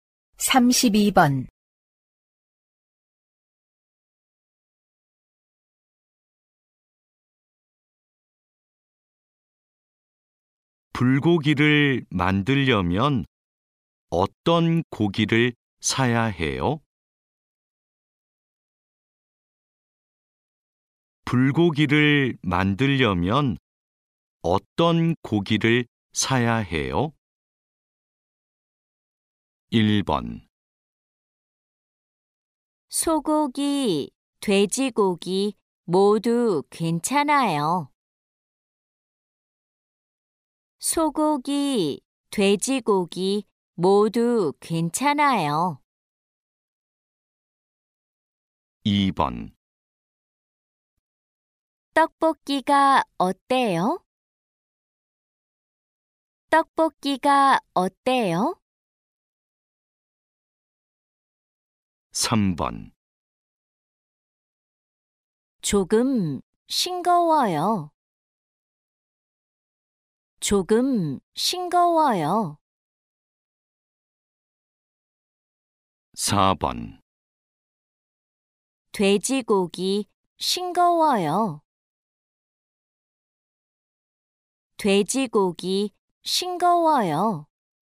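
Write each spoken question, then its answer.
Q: 불고기를 만들려면 어떤 고기를 사야 해요?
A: 1: 소고기, 돼지고기 모두 괜찮아요.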